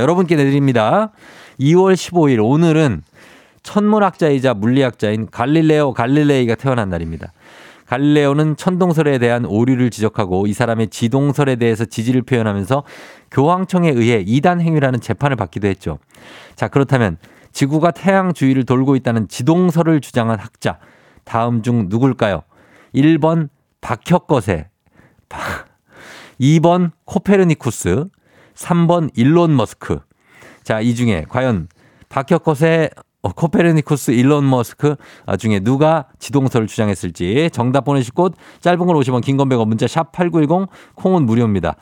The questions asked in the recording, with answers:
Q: 자, 그렇다면 지구가 태양 주위를 돌고 있다는 지동설을 주장한 학자 다음 중 누굴까요?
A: 정답 바로 코페르니쿠스죠.